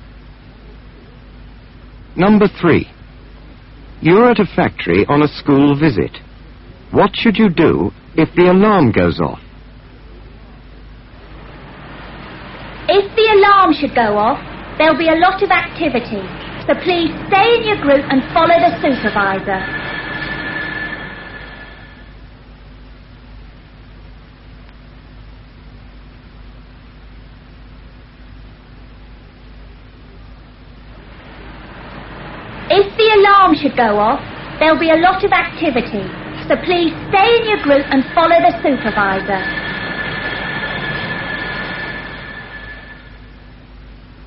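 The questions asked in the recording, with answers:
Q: What should you do if the alarm goes off?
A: Stay in your group and follow the supervisor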